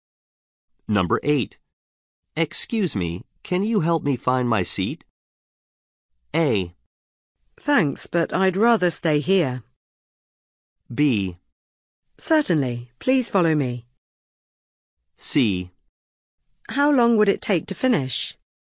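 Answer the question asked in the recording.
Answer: B: Certainly, please follow me.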